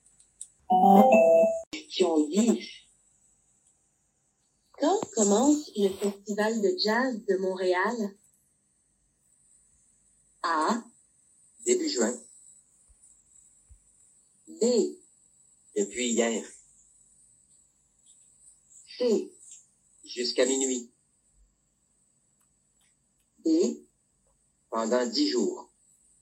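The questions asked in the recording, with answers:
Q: Quand commence le festival de jazz de Montréal?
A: A: Début juin.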